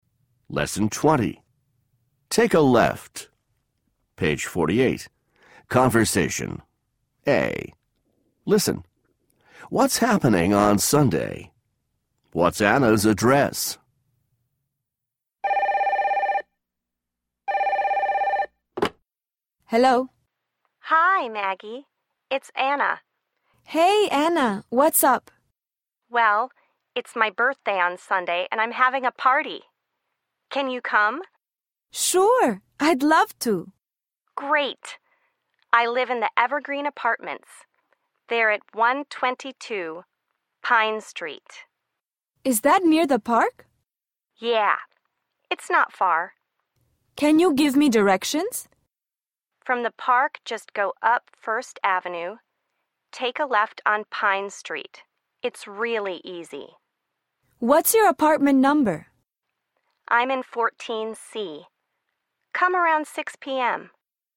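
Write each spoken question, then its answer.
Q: What's happening on Sunday?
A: Anna's birthday party

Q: What's Anna's address?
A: 122 Pine Street, Evergreen Apartments, 14C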